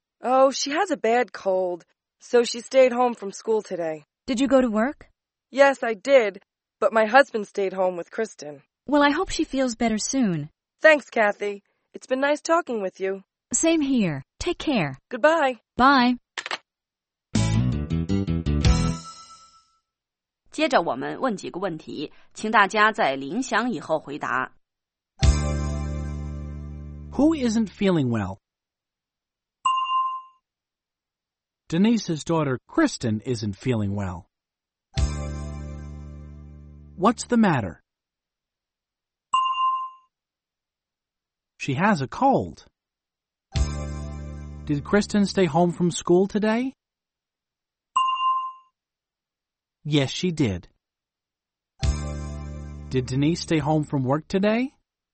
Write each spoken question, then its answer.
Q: Who isn't feeling well?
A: Denise's daughter, Kristen, isn't feeling well.